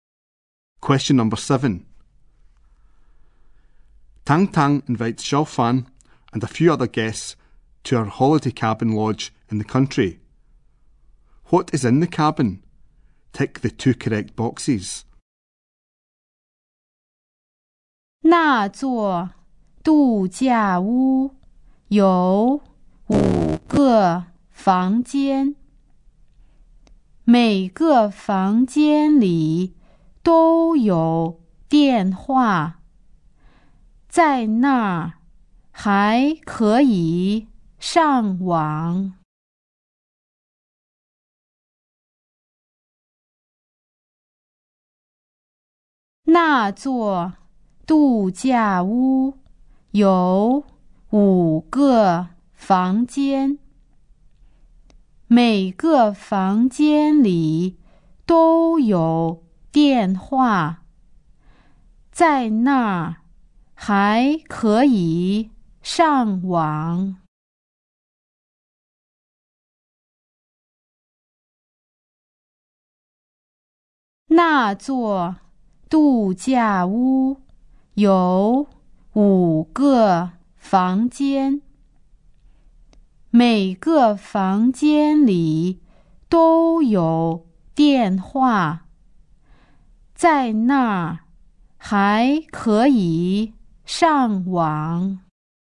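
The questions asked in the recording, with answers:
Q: What is in the cabin?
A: Five rooms, each with a telephone; internet access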